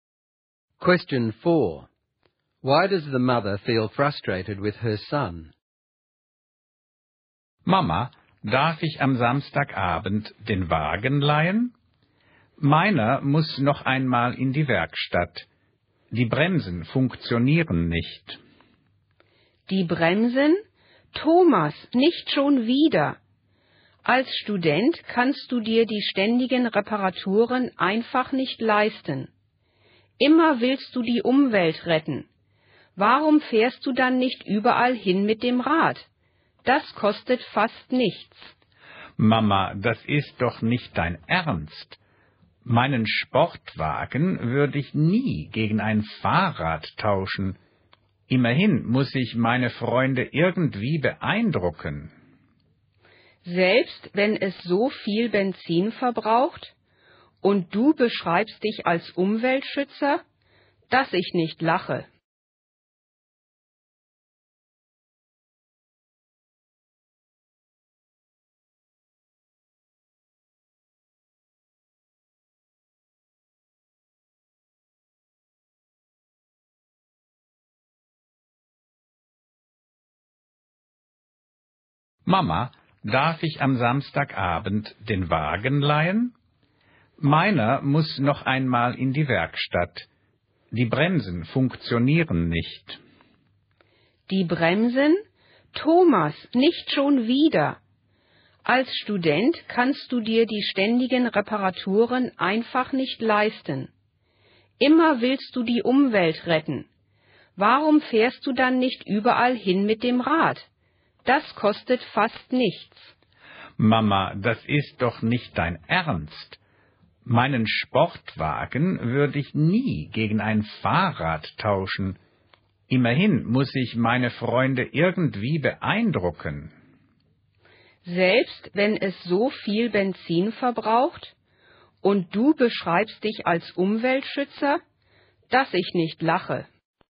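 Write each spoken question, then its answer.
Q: Why does the mother feel frustrated with her son?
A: He keeps paying for repairs to his sports car that he can't afford, and he says he protects the environment but drives a car that uses lots of petrol instead of riding a bike, just to impress his friends.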